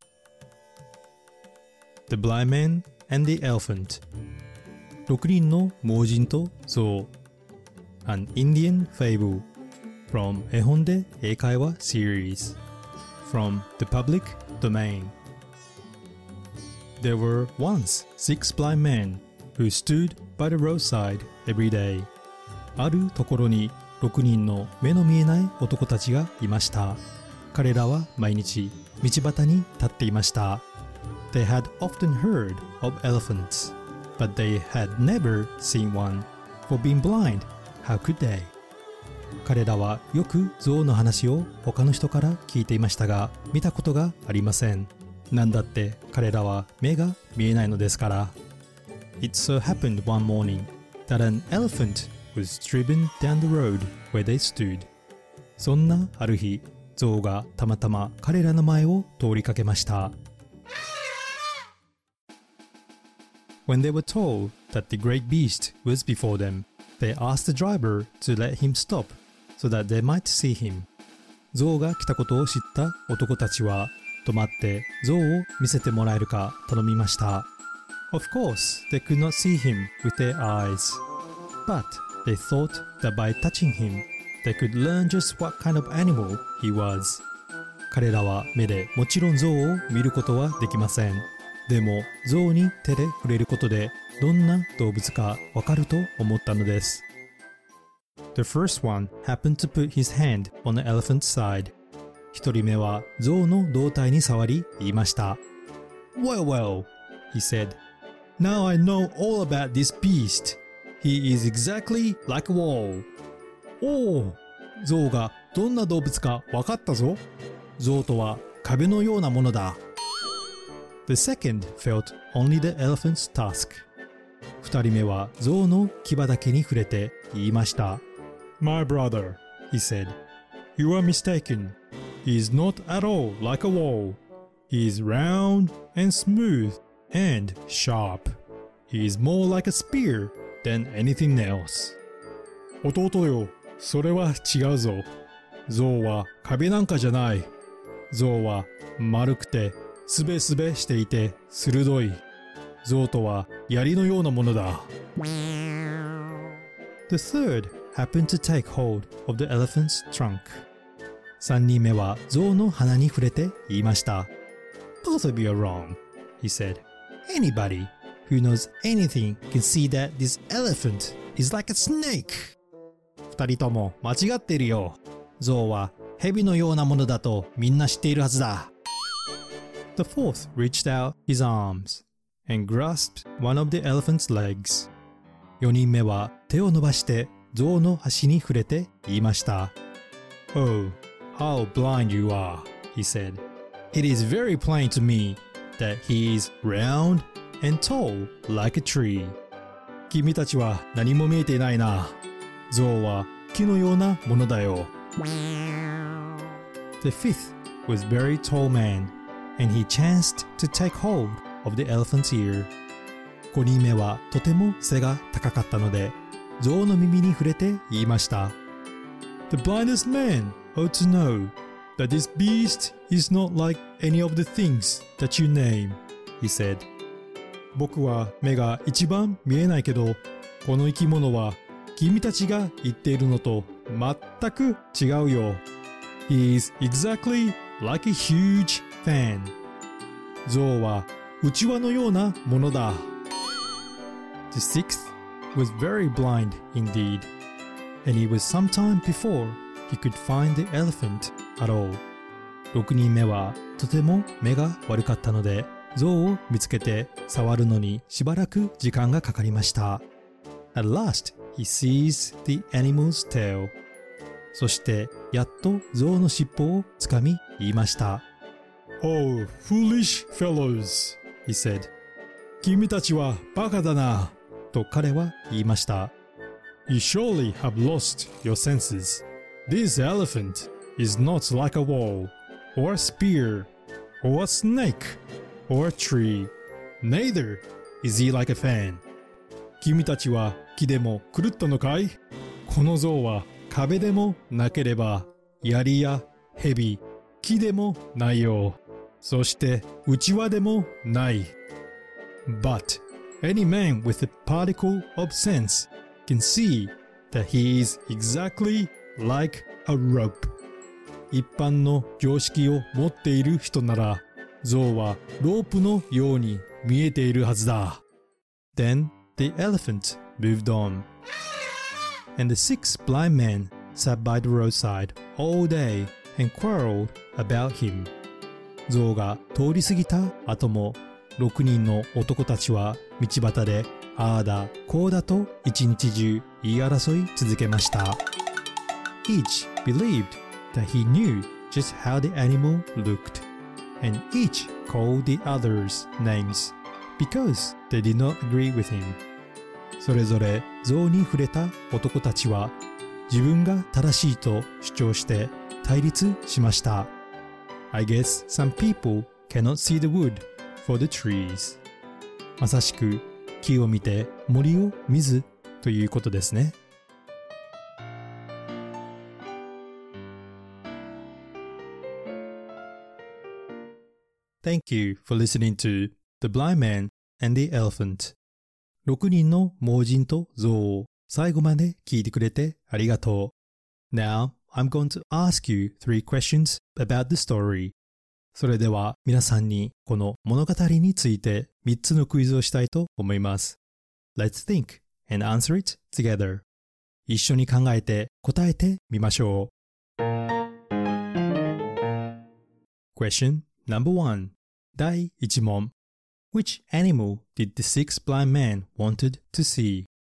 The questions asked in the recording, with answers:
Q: Which animal did the six blind men wanted to see?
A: He was an elephant です。